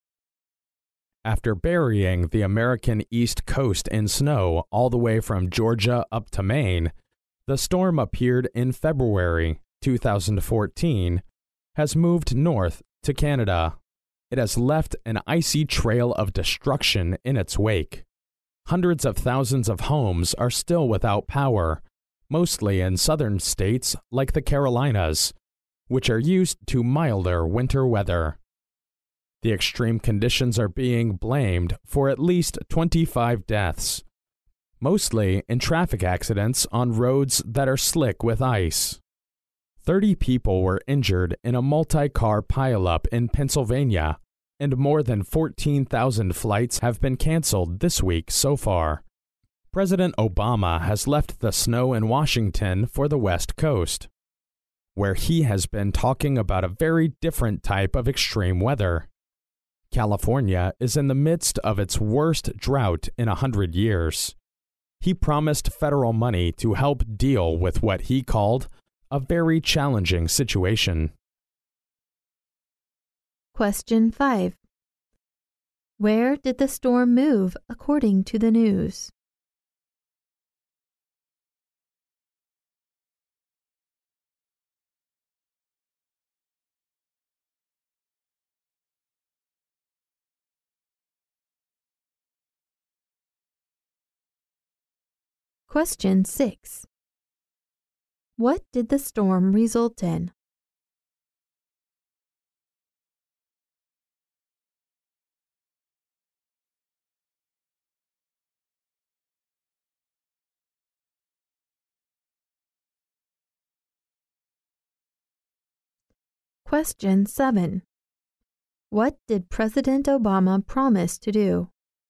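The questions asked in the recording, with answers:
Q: Where did the storm move according to the news?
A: North to Canada

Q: What did President Obama promise to do?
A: Give federal money to help deal with California's drought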